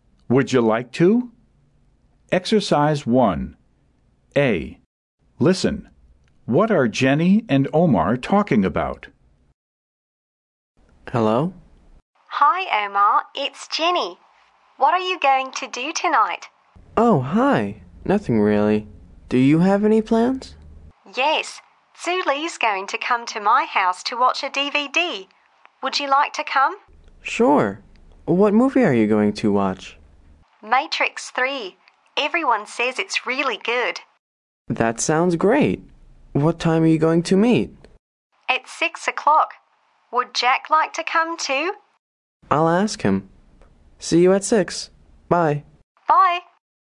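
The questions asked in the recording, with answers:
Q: What are Jenny and Omar talking about?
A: Watching a DVD (Matrix 3) at Jenny's house tonight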